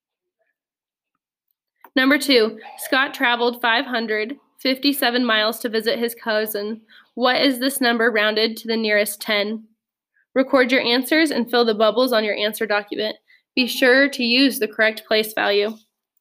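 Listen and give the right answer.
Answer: 560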